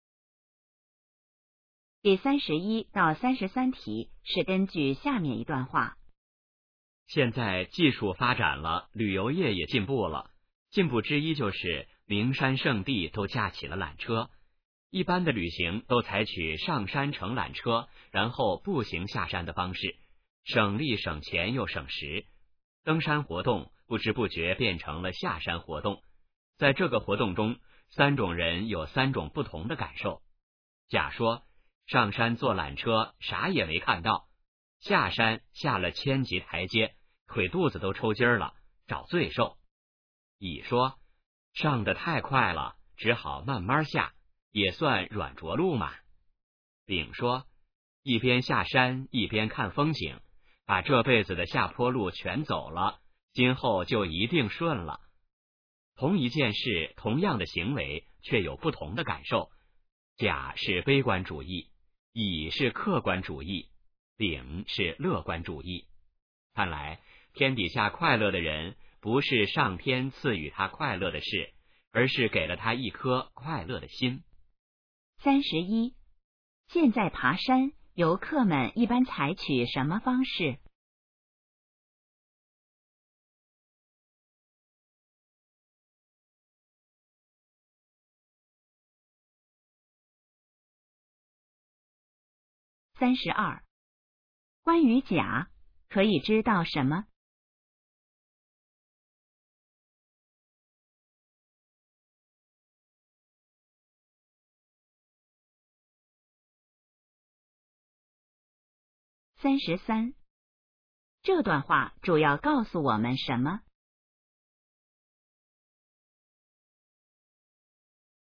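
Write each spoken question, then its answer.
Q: 现在爬山,游客们一般采取什么方式?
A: 上山乘缆车,步行下山

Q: 关于甲,可以知道什么?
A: 他是悲观主义者,觉得是找罪受

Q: 这段话主要告诉我们什么?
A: 快乐取决于有一颗快乐的心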